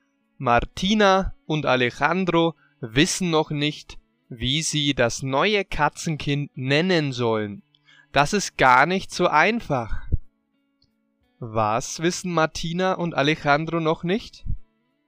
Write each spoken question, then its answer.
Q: Was wissen Martina und Alejandro noch nicht?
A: Wie sie das neue Katzenkind nennen sollen.